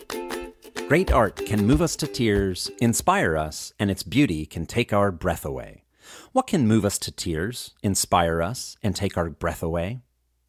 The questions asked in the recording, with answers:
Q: What can move us to tears, inspire us, and take our breath away?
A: Great art can move us to tears, inspire us, and take our breath away.